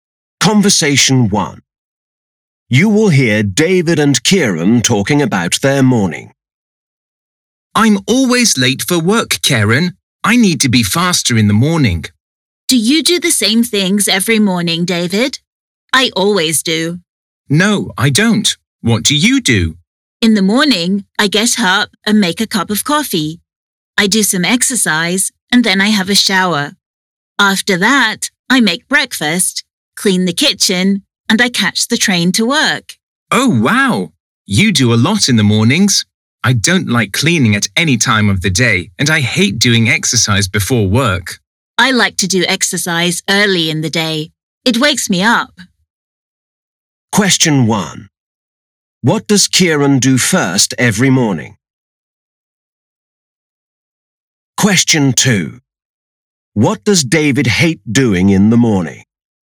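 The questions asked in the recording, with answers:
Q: What does Kieran do first every morning?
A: He makes a cup of coffee

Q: What does David hate doing in the morning?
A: Doing exercise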